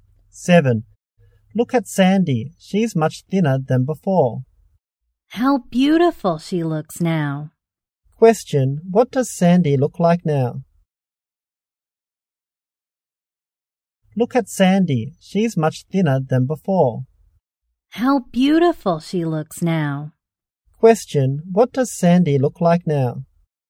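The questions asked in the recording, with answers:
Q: what does Sandy look like now?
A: Much thinner and beautiful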